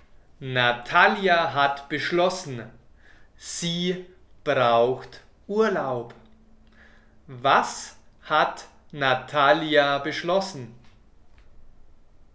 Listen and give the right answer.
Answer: Dass sie Urlaub braucht. Natalia hat das beschlossen.